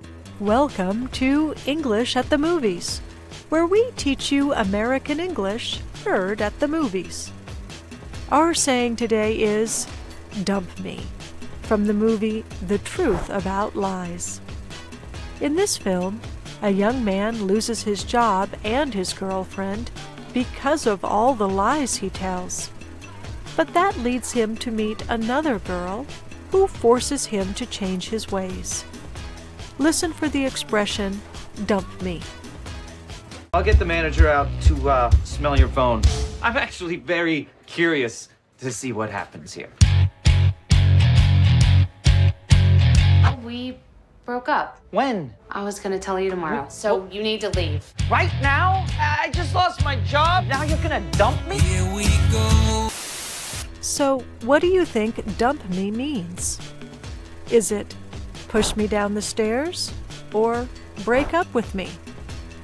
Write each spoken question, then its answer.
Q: So what do you think dump me means?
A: Dump me means to break up with me.